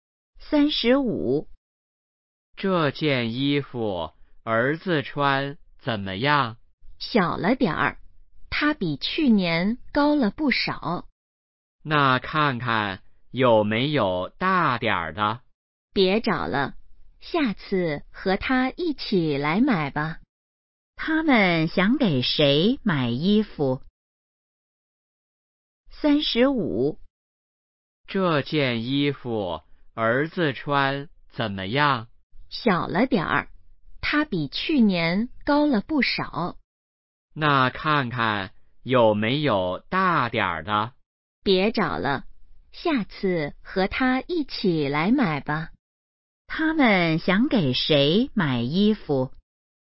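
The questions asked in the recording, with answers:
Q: 他们想给谁买衣服?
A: 儿子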